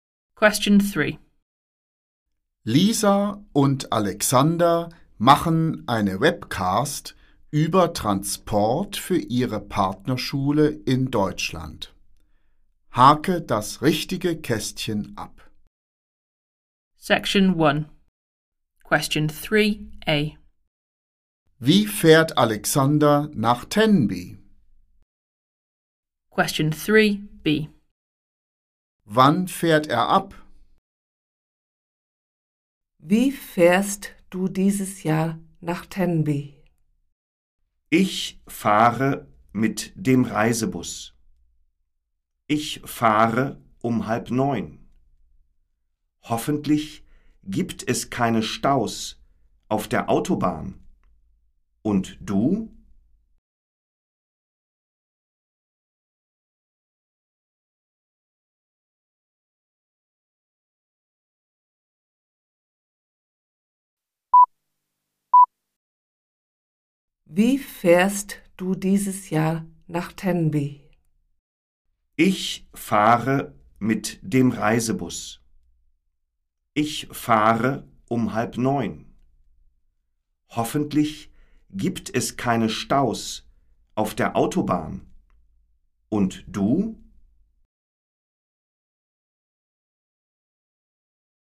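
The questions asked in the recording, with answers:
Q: Wie fährt Alexander nach Tenby?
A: Mit dem Reisebus

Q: Wann fährt er ab?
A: Um 8:30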